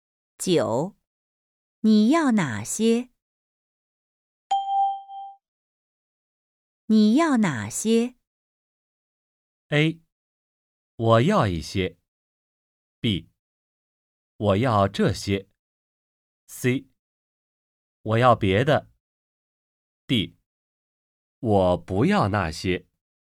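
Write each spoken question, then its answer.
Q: 你要哪些?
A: B: 我要这些。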